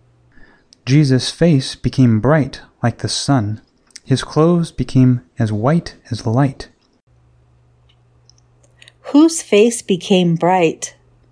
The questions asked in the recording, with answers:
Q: Whose face became bright?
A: Jesus' face became bright.